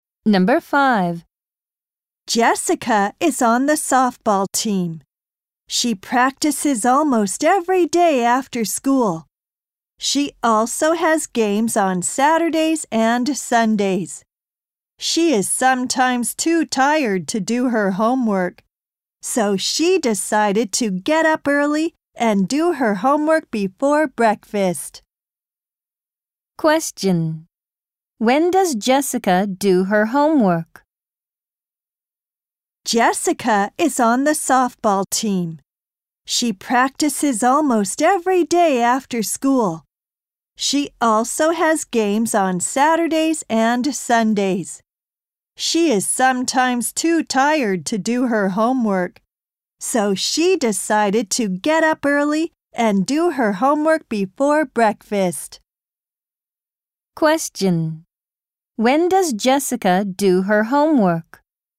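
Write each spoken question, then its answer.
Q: When does Jessica do her homework?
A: Before breakfast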